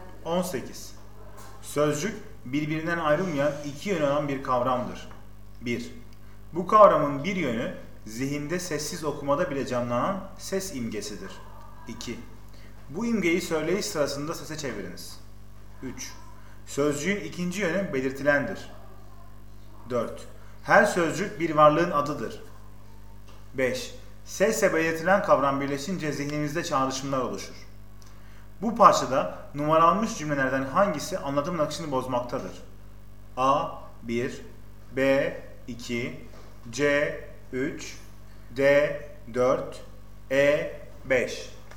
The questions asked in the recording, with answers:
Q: Bu parçada numaralanmış cümlelerden hangisi anlatım akışını bozmaktadır?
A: Doğru yanıt D.